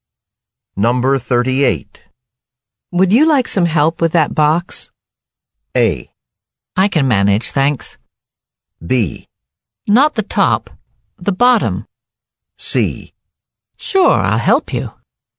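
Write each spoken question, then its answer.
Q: Would you like some help with that box?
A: A: I can manage, thanks.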